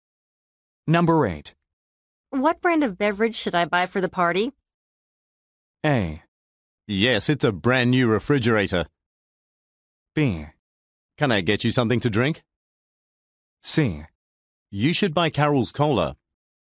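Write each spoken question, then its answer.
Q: What brand of beverage should I buy for the party?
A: C: You should buy Carol's cola.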